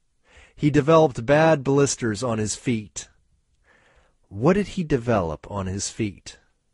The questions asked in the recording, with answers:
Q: What did he develop on his feet?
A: He developed blisters on his feet.